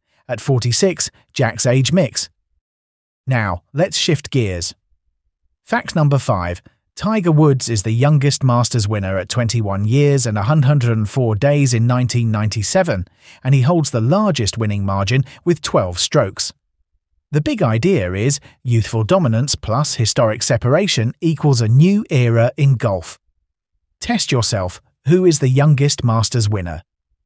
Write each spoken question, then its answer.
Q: who is the youngest Masters winner?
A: Correct answer, Tiger Woods.